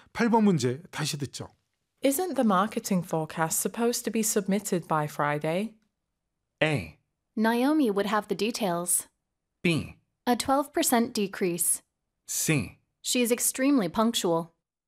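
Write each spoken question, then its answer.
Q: Isn't the marketing forecast supposed to be submitted by Friday?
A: A: Naomi would have the details.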